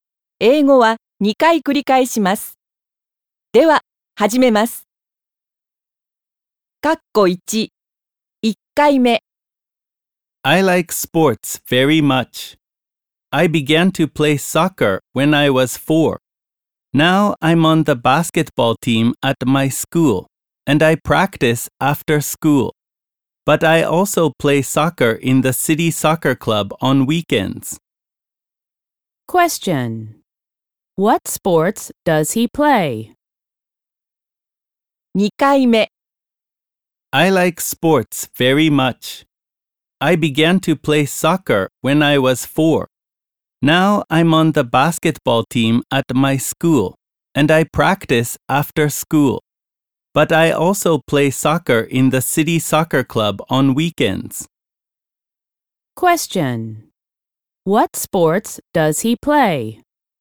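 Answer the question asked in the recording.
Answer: Soccer and basketball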